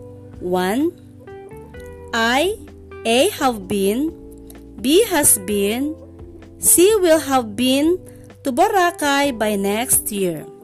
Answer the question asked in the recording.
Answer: Yes, it's letter C, will have been.